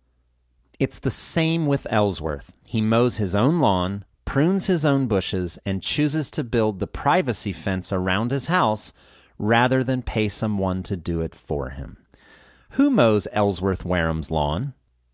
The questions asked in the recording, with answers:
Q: Who mows Ellsworth Wareham's lawn?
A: Ellsworth does. He mows his own lawn.